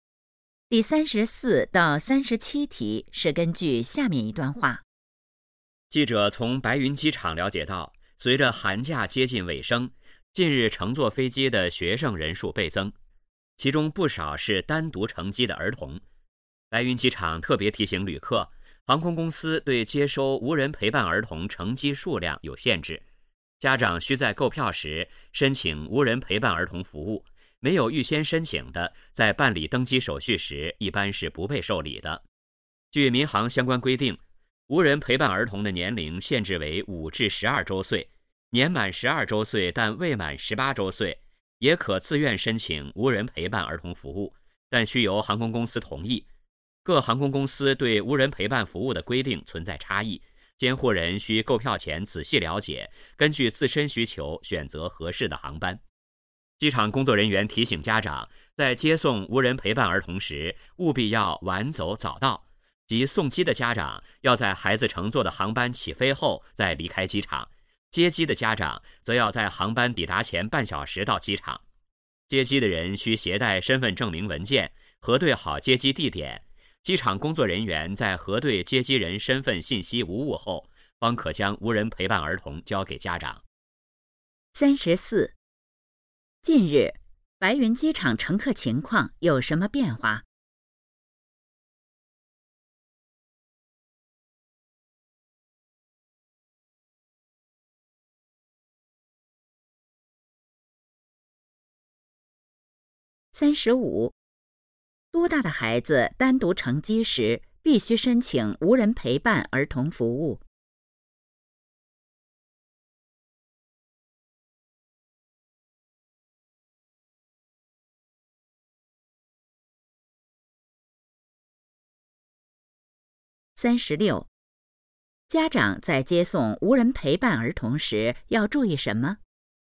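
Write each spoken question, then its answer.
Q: 近日,白云机场乘客情况有什么变化?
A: 乘飞机的学生人数倍增

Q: 多大的孩子单独乘机时, 必须申请无人陪伴儿童服务。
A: 5至12周岁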